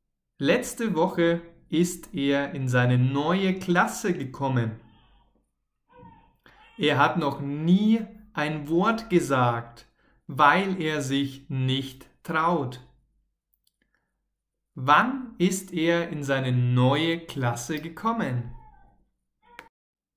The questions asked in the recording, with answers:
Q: Wann ist er in seine neue Klasse gekommen?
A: letzte Woche. Er ist letzte Woche in seine neue Klasse gekommen.